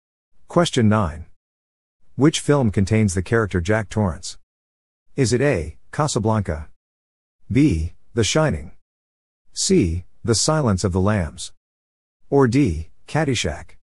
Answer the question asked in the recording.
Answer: The answer is B. The Shining.